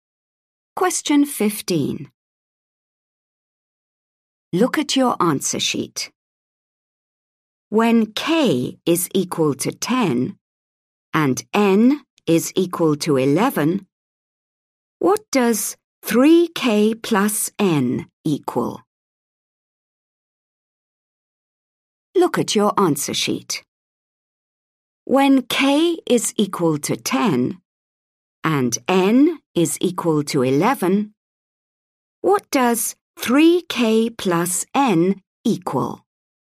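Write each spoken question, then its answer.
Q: When k is equal to 10 and n is equal to 11, what does 3k plus n equal?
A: 41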